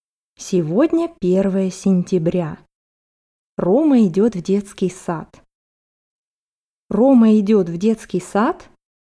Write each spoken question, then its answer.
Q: Рома идет в детский сад?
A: Да, Рома идет в детский сад.